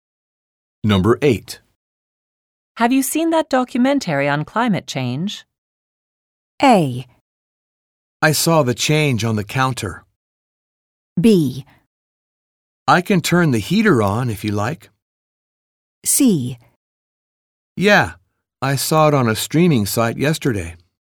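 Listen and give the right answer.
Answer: C: Yeah, I saw it on a streaming site yesterday.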